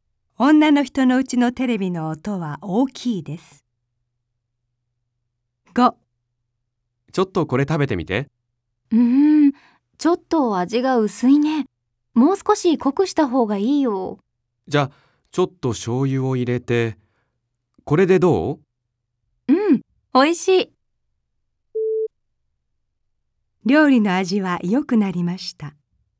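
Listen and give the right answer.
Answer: ○(正しい)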